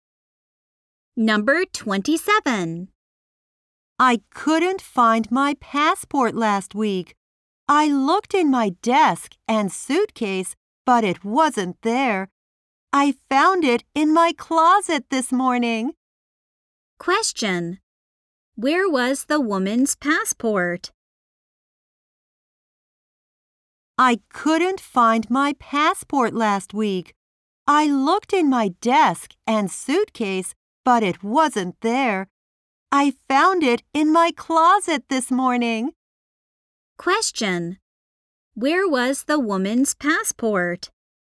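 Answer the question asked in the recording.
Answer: In her closet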